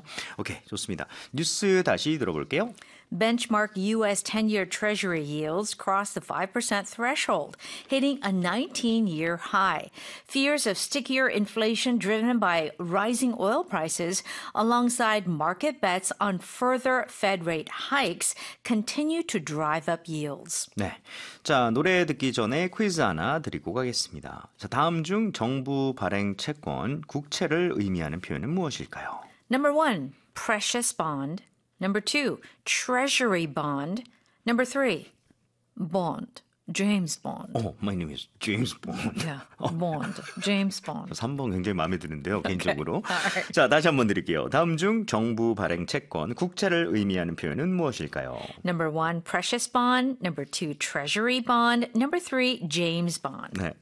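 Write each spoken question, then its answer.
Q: 다음 중 정부 발행 채권, 국채를 의미하는 표현은 무엇일까요?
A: 2: treasury bond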